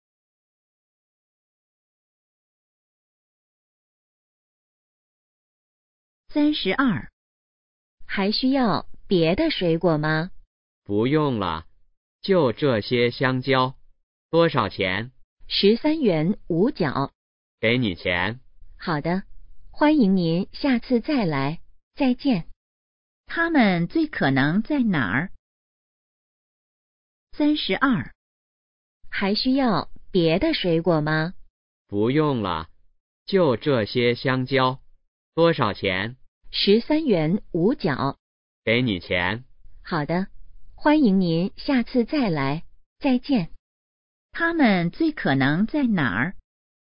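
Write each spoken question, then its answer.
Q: 他们最可能在哪儿?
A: 水果店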